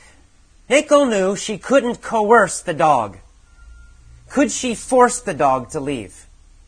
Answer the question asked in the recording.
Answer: No, she could not force the dog to leave.